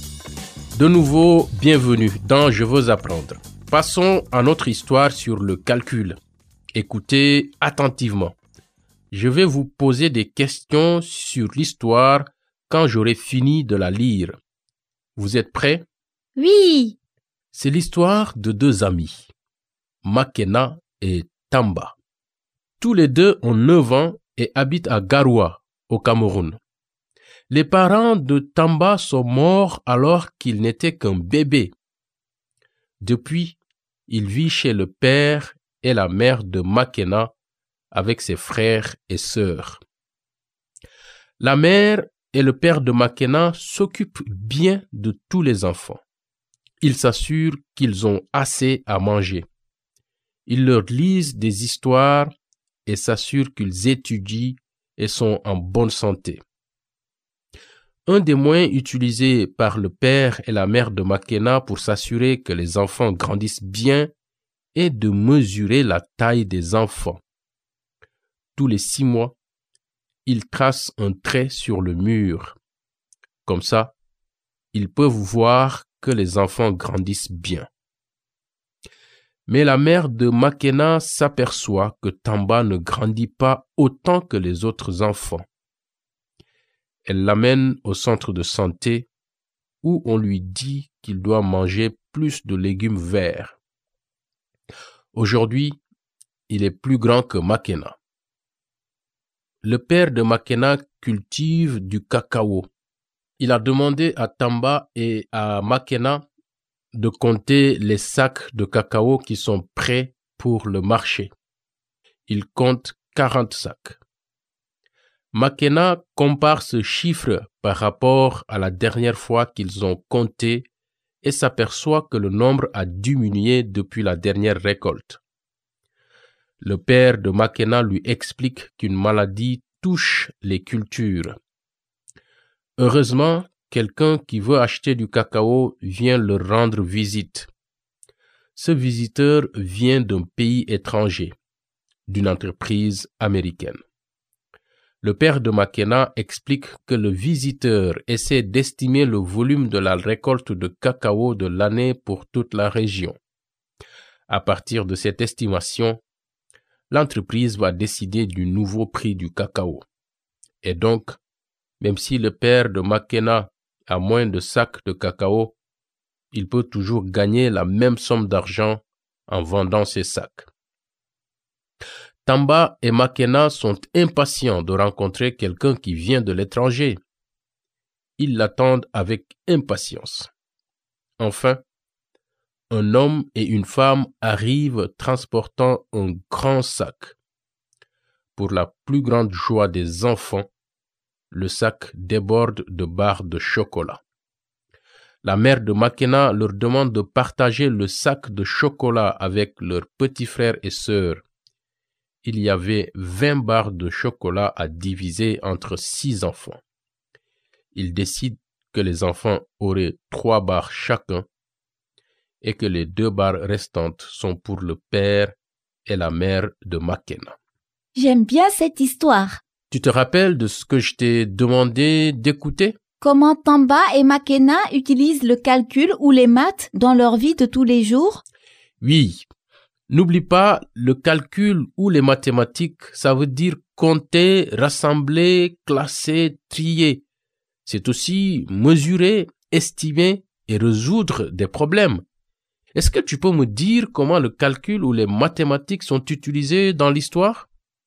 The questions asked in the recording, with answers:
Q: Est-ce que tu peux me dire comment le calcul ou les mathématiques sont utilisés dans l'histoire?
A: Ils utilisent les maths pour compter les sacs de cacao prêts pour le marché.